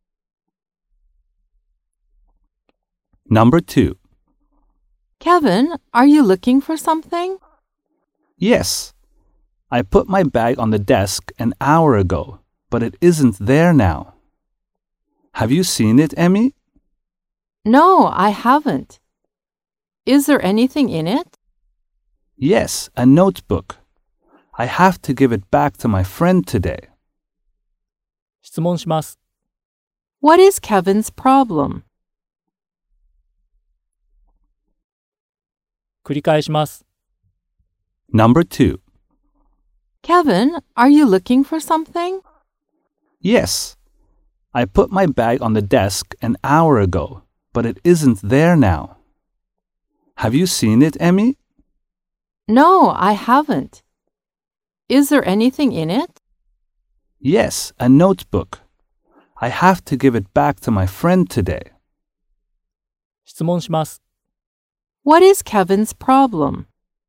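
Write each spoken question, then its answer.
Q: What is Kevin's problem?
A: He can't find his bag (with a notebook he must return to his friend today).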